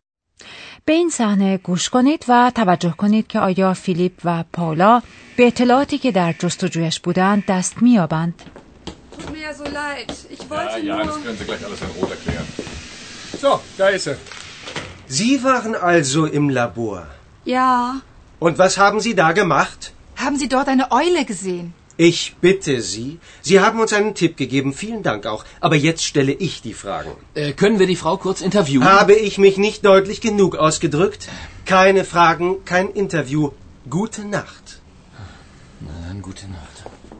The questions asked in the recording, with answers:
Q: به این صحنه گوش کنید و توجه کنید که آیا فیلیپ و پاولا به اطلاعاتی که در جستجویش بودند دست مییابند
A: متاسفانه فیلیپ و پالا اطلاعات جدیدی به دست نمی آورند.